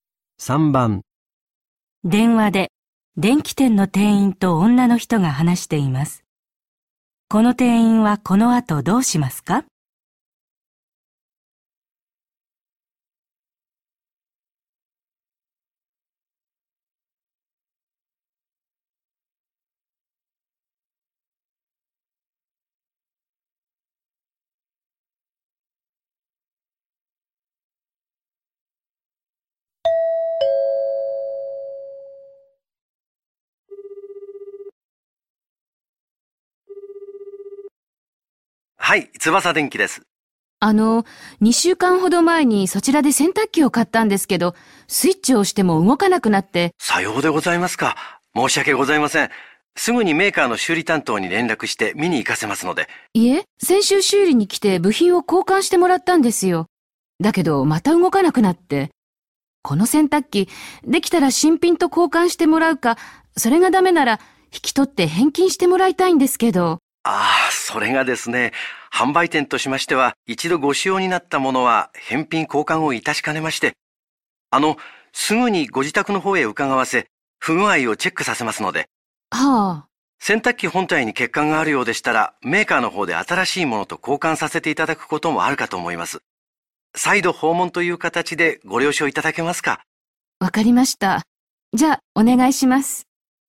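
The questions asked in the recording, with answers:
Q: この店員はこの後どうしますか?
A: 自宅に人を行かせて洗濯機の不具合をチェックさせる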